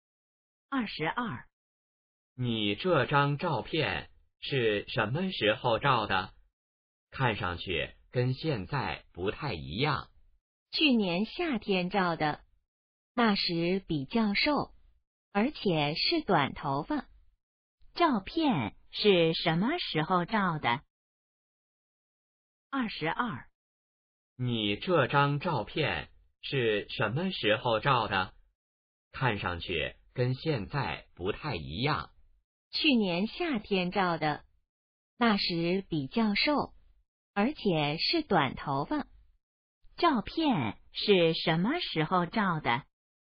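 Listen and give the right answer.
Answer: 去年夏天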